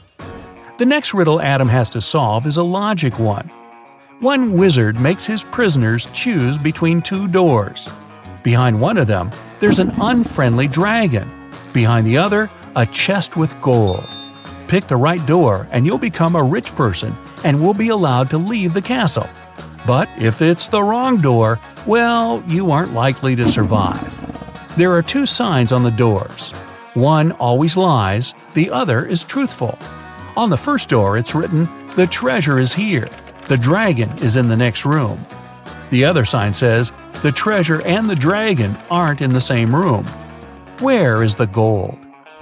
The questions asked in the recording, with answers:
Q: Where is the gold?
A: The chest with the treasure is in the second room.